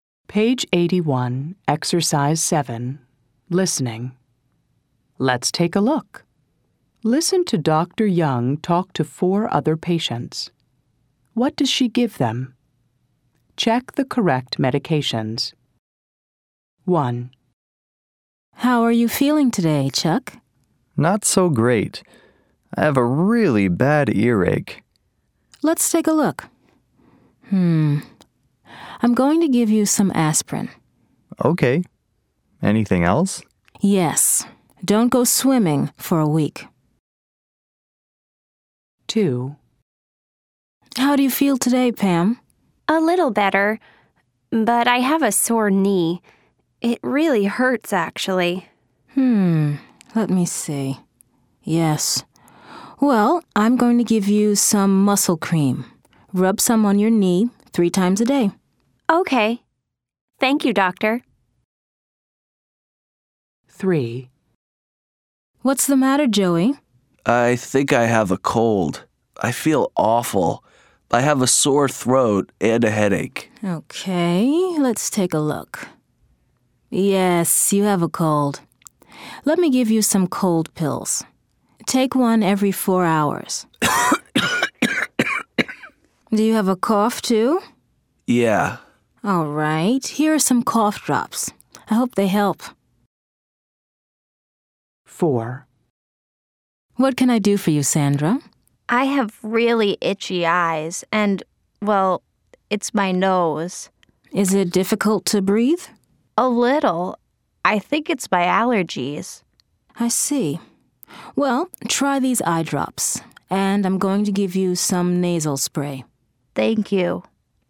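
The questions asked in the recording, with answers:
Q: What does she give them?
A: Chuck: aspirin

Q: What does she give them?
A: Pam: muscle cream

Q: What does she give them?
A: Joey: cold pills and cough drops

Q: What does she give them?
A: Sandra: eye drops and nasal spray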